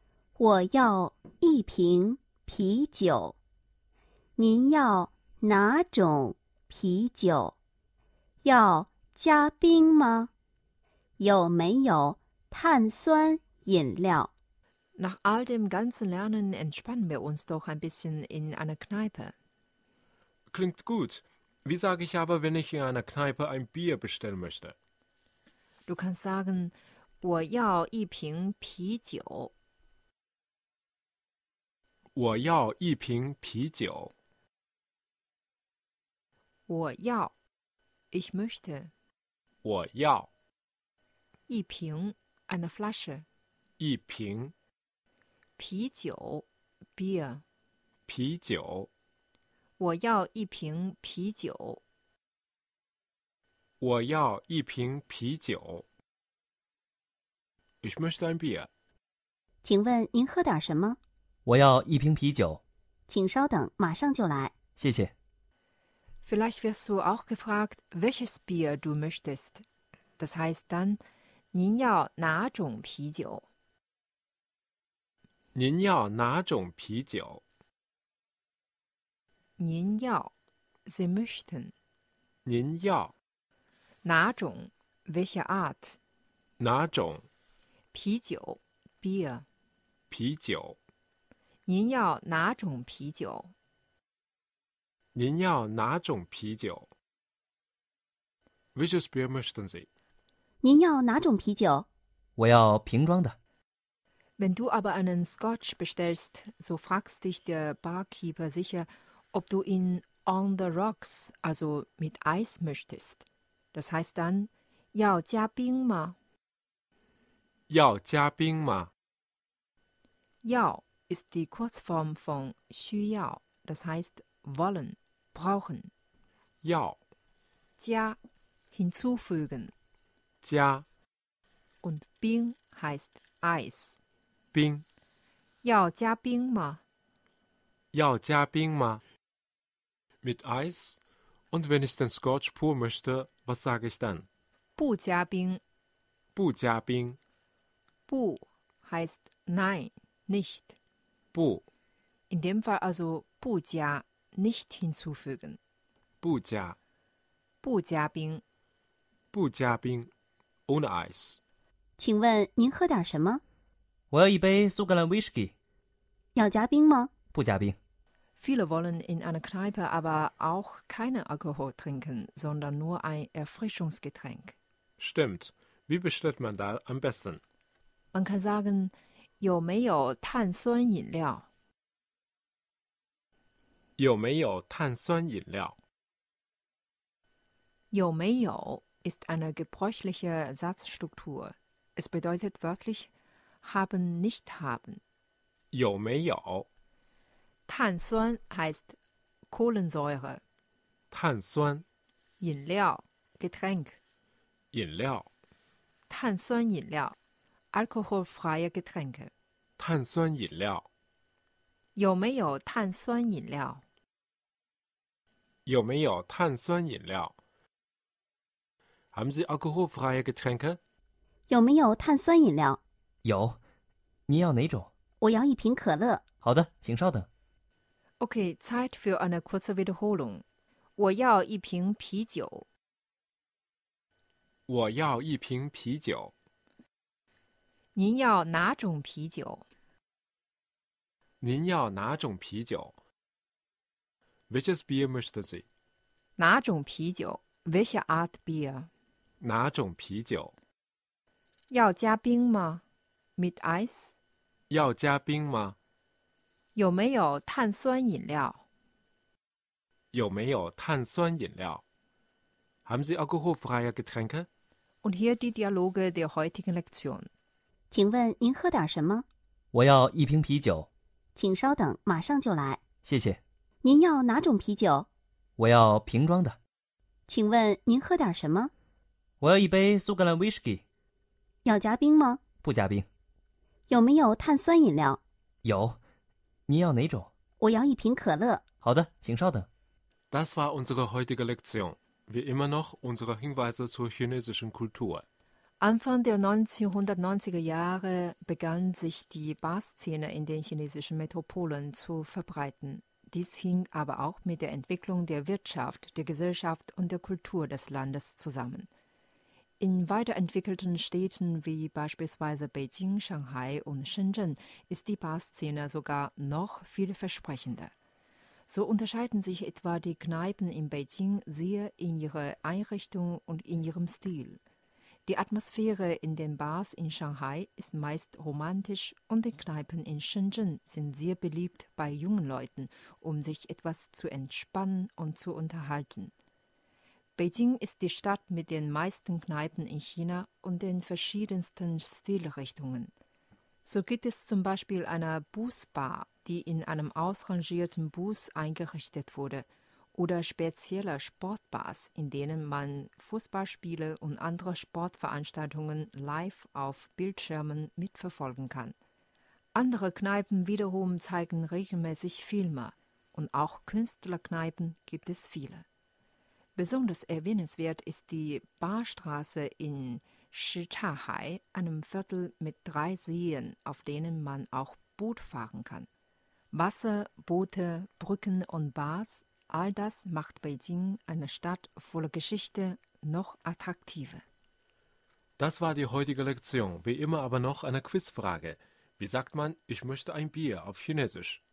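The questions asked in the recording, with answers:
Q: Wie sagt man, ich möchte ein Bier auf Chinesisch?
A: 我要一瓶啤酒。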